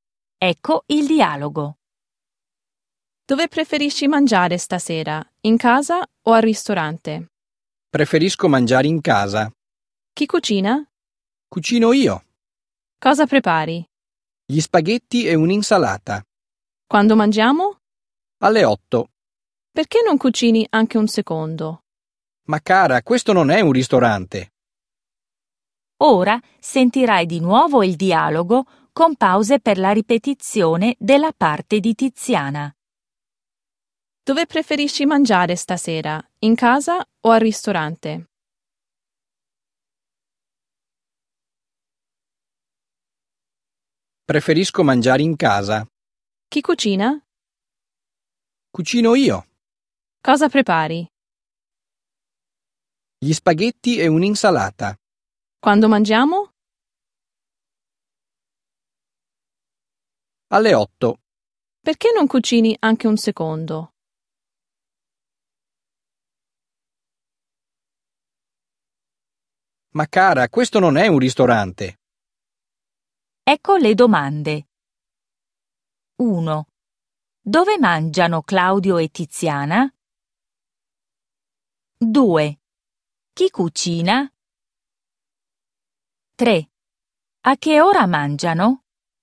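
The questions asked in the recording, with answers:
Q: Dove mangiano Claudio e Tiziana?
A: In casa

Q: A che ora mangiano?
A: Alle 8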